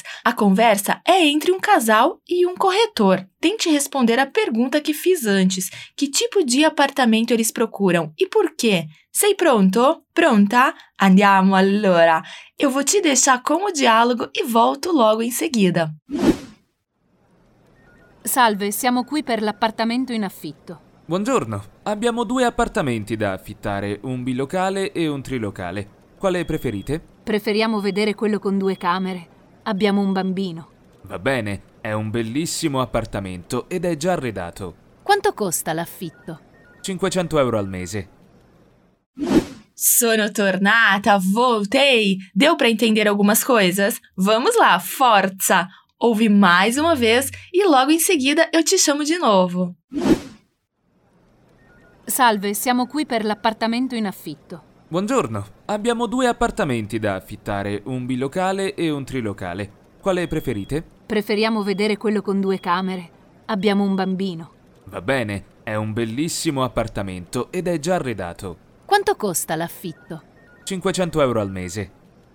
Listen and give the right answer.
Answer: Bom, eles têm preferência por aquele com dois quartos, né? O trilocale.